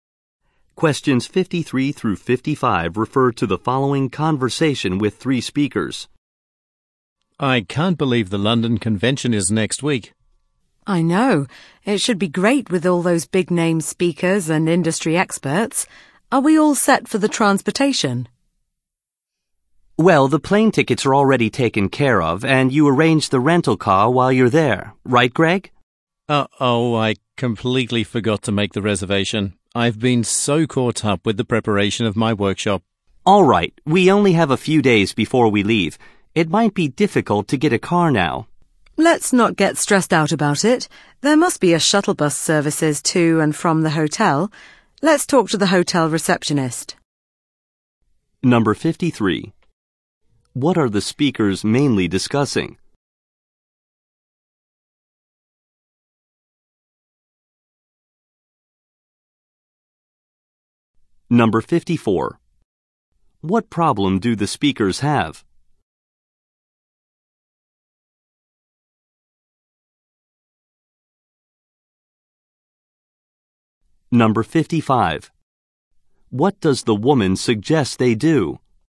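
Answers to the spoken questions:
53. Transportation for the London Convention
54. The rental car was not reserved
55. Ask the hotel receptionist about a shuttle bus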